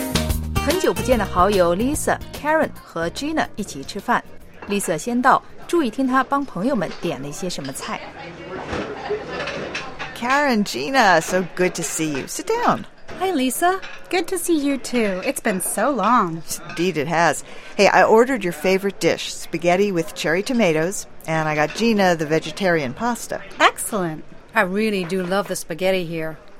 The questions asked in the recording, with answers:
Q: 注意听她帮朋友们点了一些什么菜。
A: Lisa 最早一个到,已经帮 Karen 和 Gina 点好了他们最爱吃的菜。